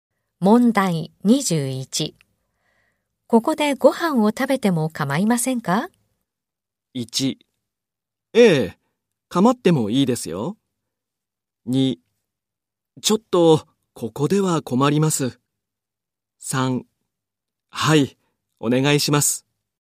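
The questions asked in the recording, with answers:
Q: ここでご飯を食べても構いませんか?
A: 1: ちょっとここでは困ります。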